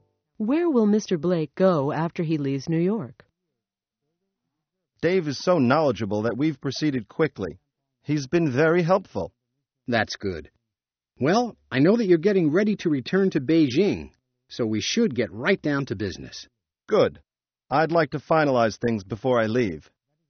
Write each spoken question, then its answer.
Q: Where will Mr. Blake go after he leaves New York?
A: He'll return to Beijing.